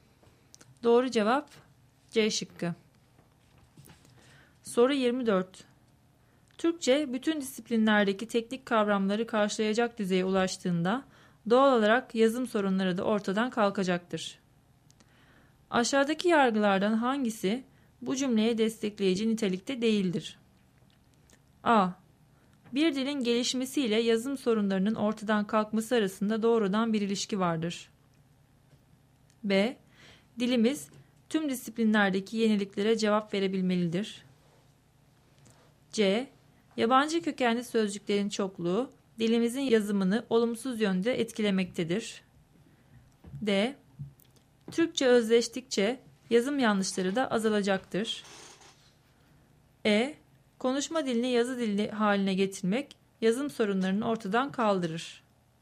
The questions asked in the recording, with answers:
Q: Aşağıdaki yargılardan hangisi bu cümleye destekleyici nitelikte değildir?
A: Doğru cevap E şıkkı.